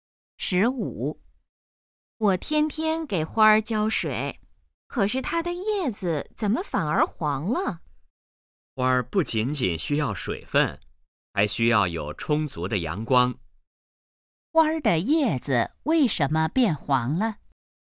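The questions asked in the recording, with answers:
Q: 花儿的叶子为什么变黄了?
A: 缺少阳光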